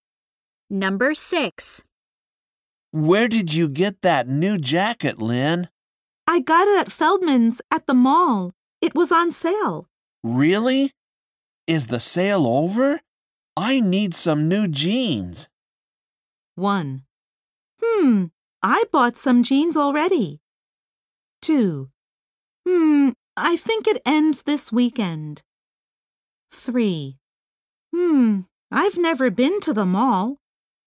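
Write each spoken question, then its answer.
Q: Really? Is the sale over?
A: 2: I think it ends this weekend.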